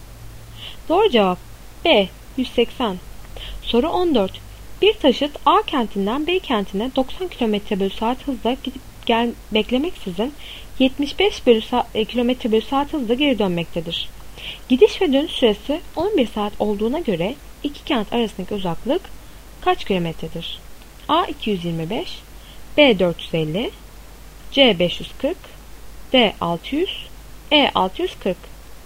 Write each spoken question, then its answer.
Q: Gidiş ve dönüş süresi 11 saat olduğuna göre iki kent arasındaki uzaklık kaç kilometredir?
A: Doğru cevap B 450.